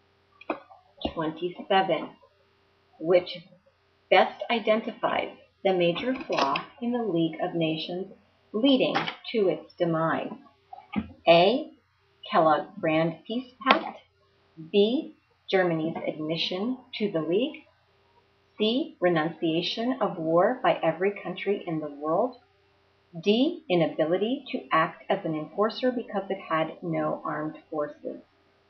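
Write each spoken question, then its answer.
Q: Which best identifies the major flaw in the League of Nations leading to its demise?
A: D: Inability to act as an enforcer because it had no armed forces.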